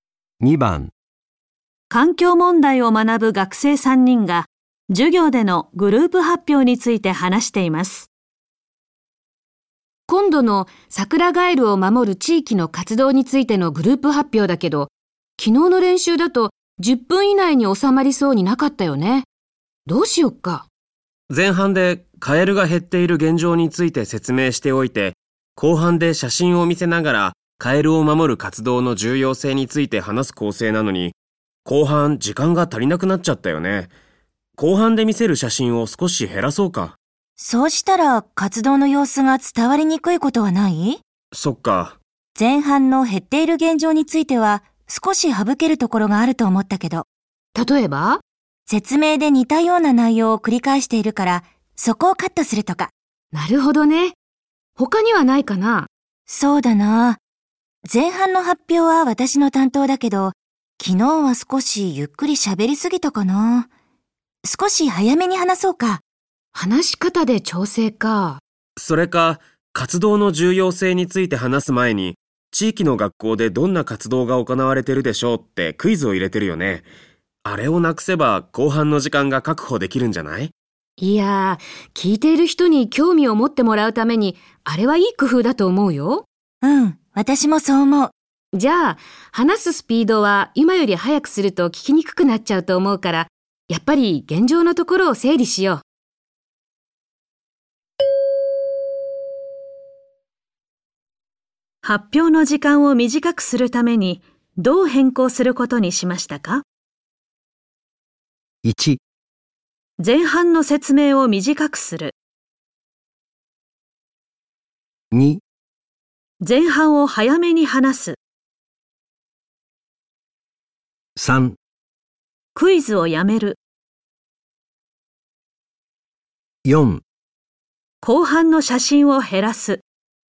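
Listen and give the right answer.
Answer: 1: 前半の説明を短くする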